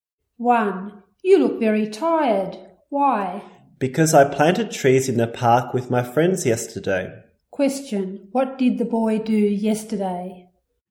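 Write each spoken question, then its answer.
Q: What did the boy do yesterday?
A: He planted trees in the park with his friends.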